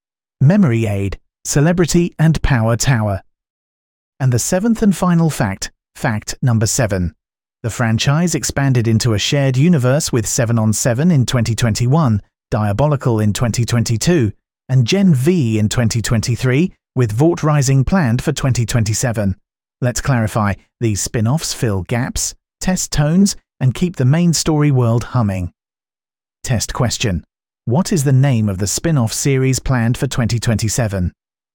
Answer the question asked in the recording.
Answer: Correct answer, Vought Rising.